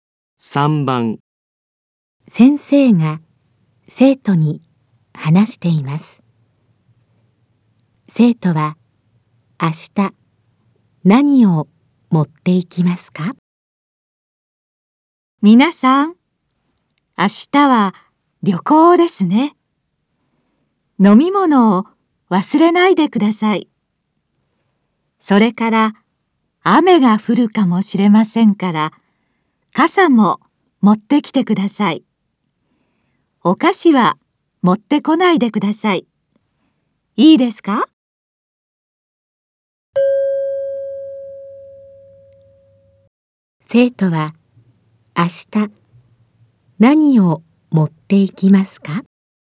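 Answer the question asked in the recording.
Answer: 飲み物と傘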